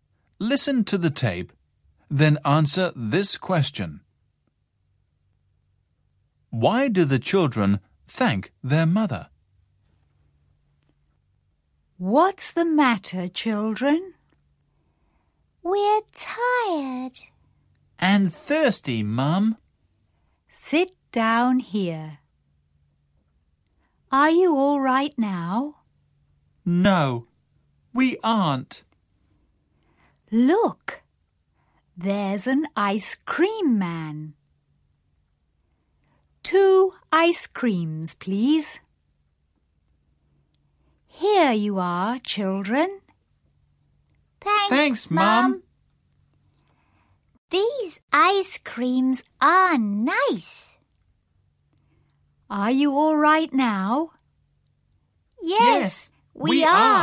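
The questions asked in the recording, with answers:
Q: Why do the children thank their mother?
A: Because she buys them ice creams.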